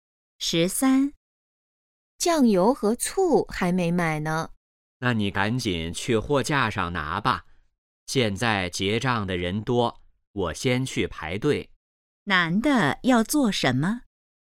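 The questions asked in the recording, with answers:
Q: 男的要做什么?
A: 去排队结账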